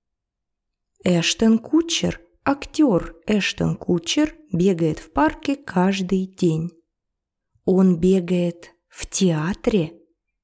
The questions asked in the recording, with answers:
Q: Он бегает в театре?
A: Нет, он бегает в парке.